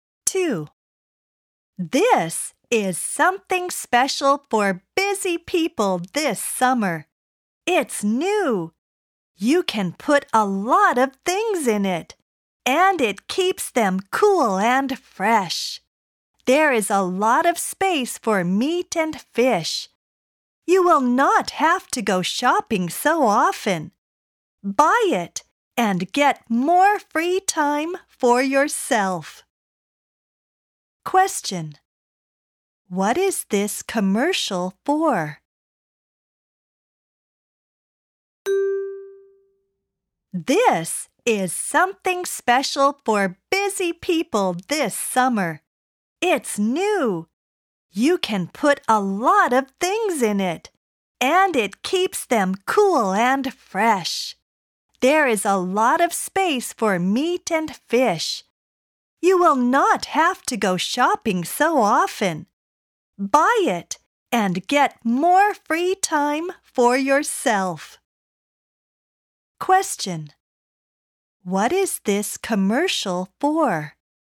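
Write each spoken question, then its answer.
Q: What is this commercial for?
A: A refrigerator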